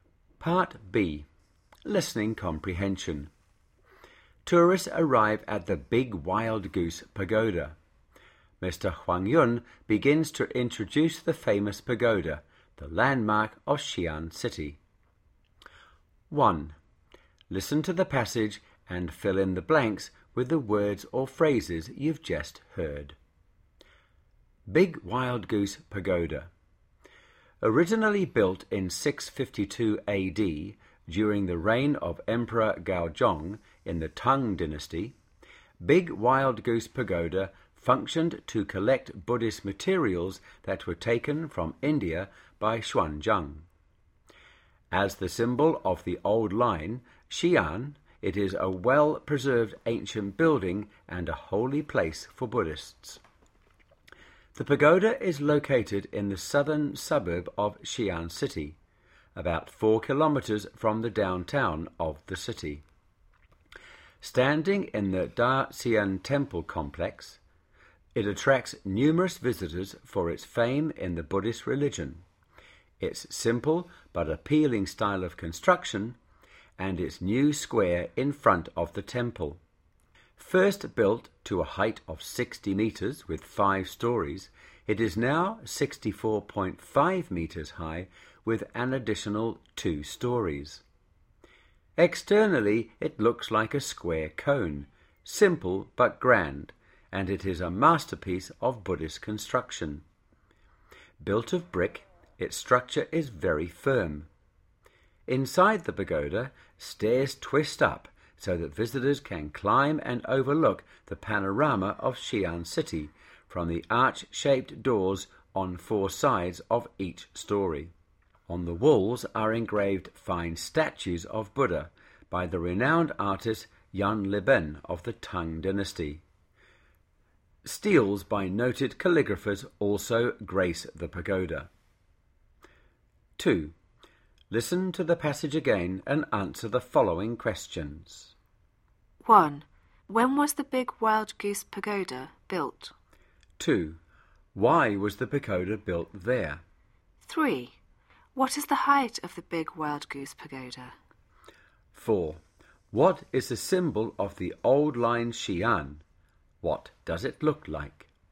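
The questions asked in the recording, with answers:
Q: When was the big wild goose pagoda built?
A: In 652 AD, during the reign of Emperor Gaozong of the Tang Dynasty

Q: What is the height of the big wild goose pagoda?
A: 64.5 meters

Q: What is the symbol of the old line Xi'an?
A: The Big Wild Goose Pagoda

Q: What does it look like?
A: A square cone, simple but grand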